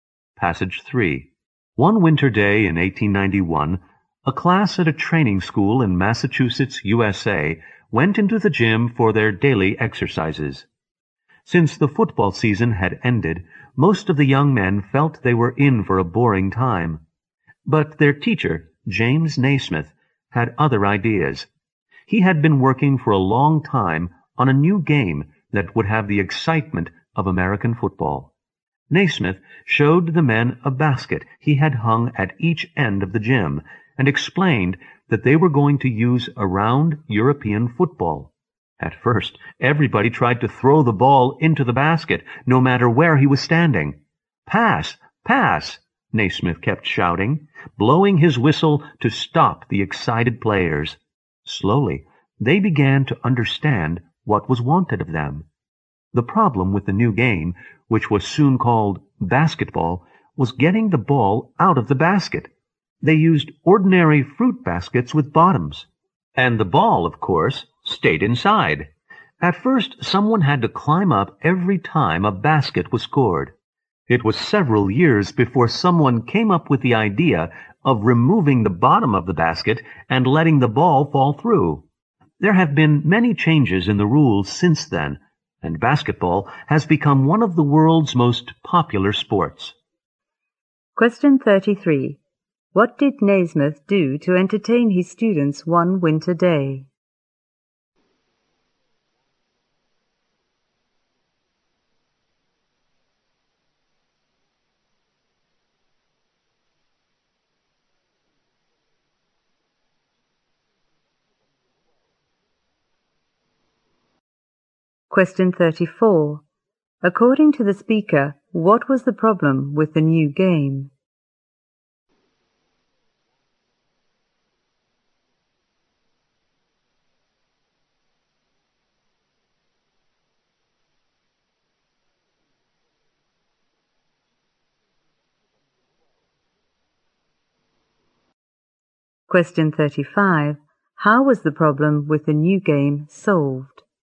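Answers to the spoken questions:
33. He introduced a new game: basketball.
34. Getting the ball out of the basket
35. By removing the bottom of the basket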